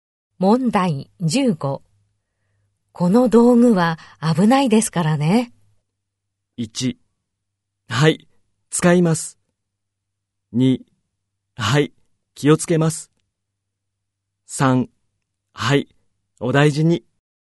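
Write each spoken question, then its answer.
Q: この道具は危ないですからね。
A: 3: はい、気をつけます。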